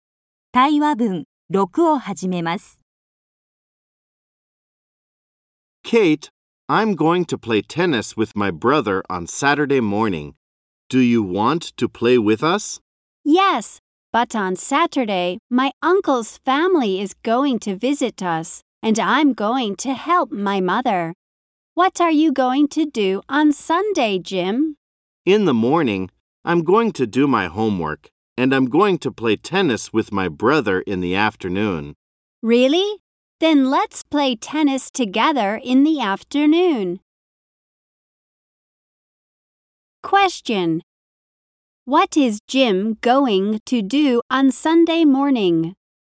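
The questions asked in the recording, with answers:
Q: What is Jim going to do on Sunday morning?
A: He is going to do his homework.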